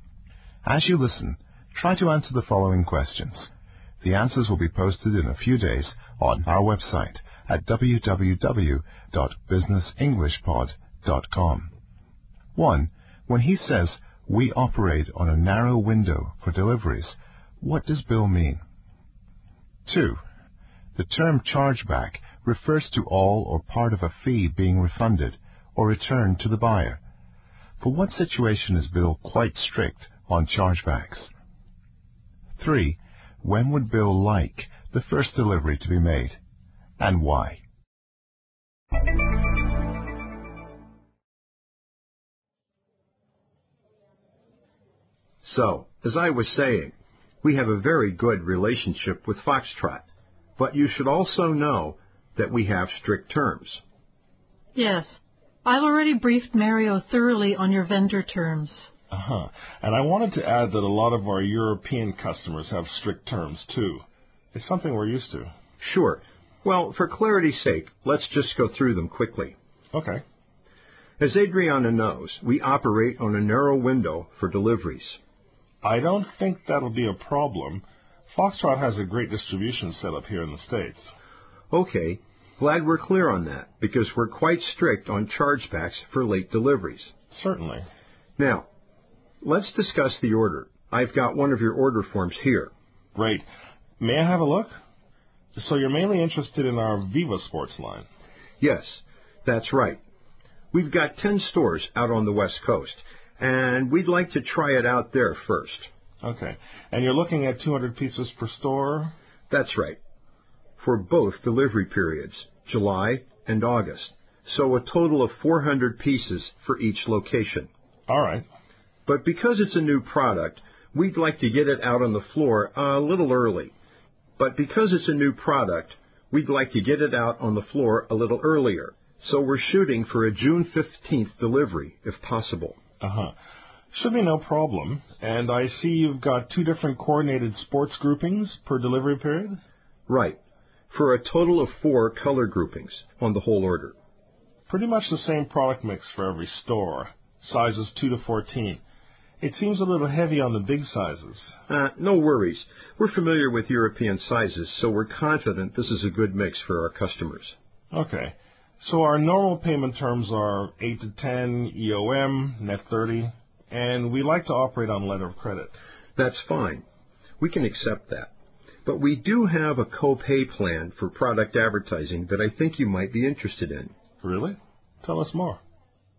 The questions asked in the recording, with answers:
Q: When he says, "We operate on a narrow window for deliveries," what does Bill mean?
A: To operate on a narrow window for deliveries thus means to accept deliveries only during a brief time frame, not too early and not too late.

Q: For what situation is Bill quite strict on chargebacks?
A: Bill is underlining that his company is strict or careful and exact about chargebacks for late deliveries, that is, if the product is delivered late.

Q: When would Bill like the first delivery to be made, and why?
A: Viva is a new line for Bill's stores, so he wants more time to promote the product and to let his customers get to know it.